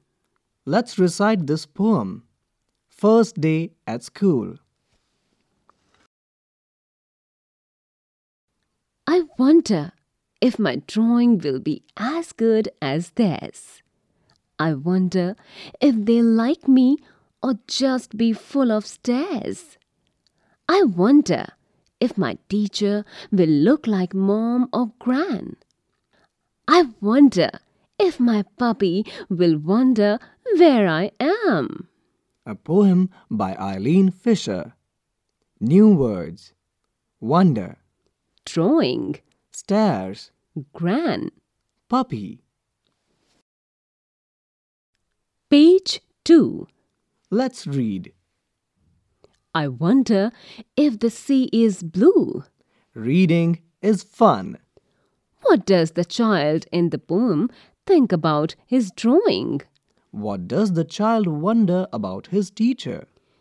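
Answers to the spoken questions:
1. He wonders if his drawing will be as good as theirs.
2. Whether his teacher will look like mom or gran.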